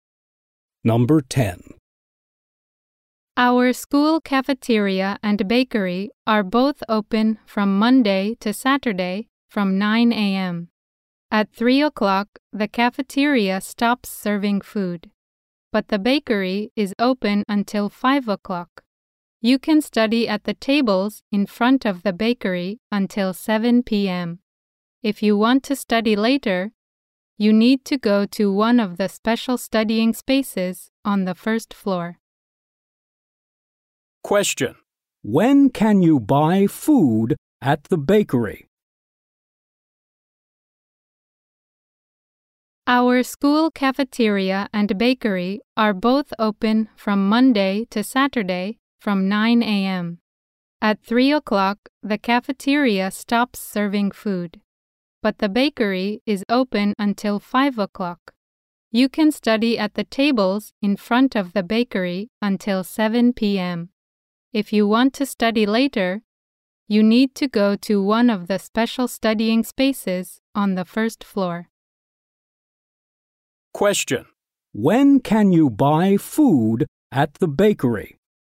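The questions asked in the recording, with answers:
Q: When can you buy food at the bakery?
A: Monday to Saturday, from 9 a.m. to 5 p.m.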